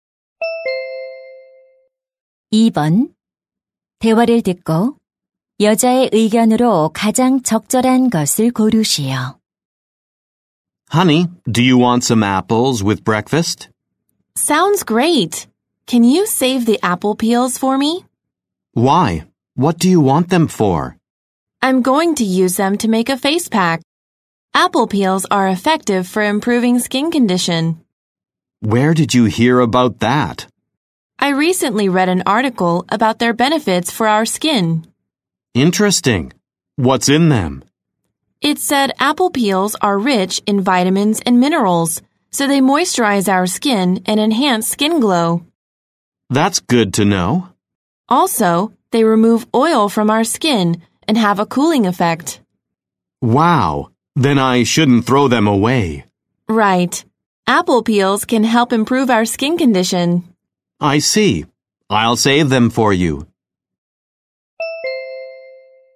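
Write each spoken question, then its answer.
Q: 대화를 듣고 여자의 의견으로 가장 적절한 것을 고르시오.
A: 사과 껍질은 피부 상태 개선에 도움이 된다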